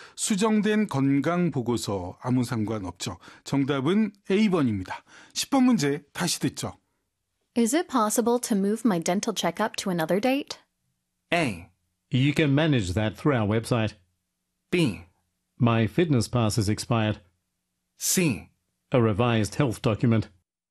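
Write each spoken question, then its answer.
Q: Is it possible to move my dental checkup to another date?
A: A: You can manage that through our website.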